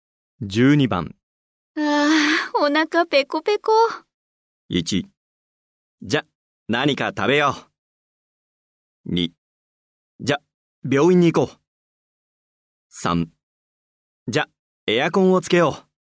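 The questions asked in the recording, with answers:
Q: ああ、お腹ペコペコ。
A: 1: じゃ、何か食べよう。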